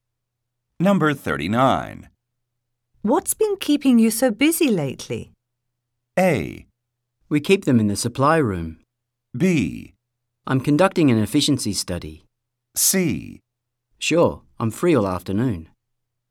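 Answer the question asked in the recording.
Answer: B: I'm conducting an efficiency study.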